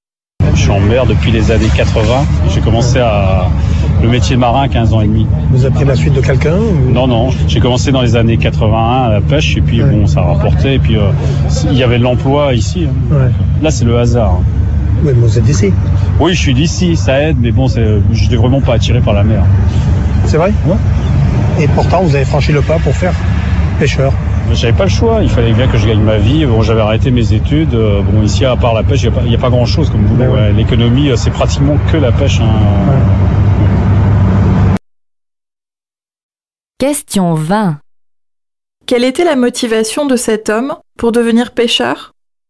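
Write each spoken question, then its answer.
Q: Quelle était la motivation de cet homme pour devenir pêcheur ?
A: Gagner sa vie : il n'y avait pas d'autre travail que la pêche ici.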